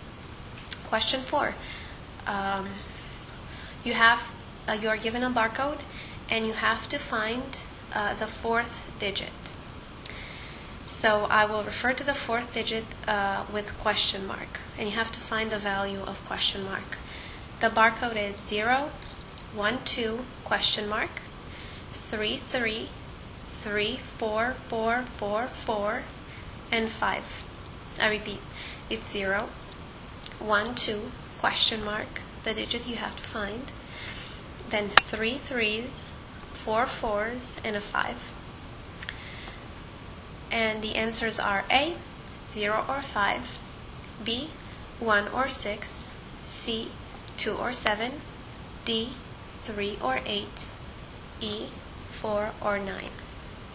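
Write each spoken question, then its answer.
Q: You are given a barcode, and you have to find the fourth digit.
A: A: 0 or 5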